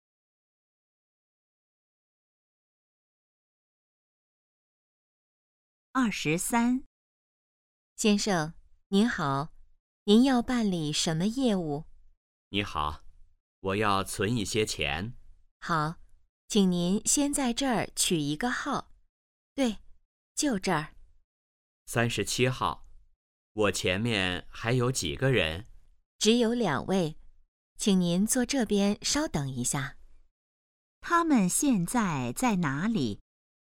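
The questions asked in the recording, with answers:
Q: 他们现在在哪里?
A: 银行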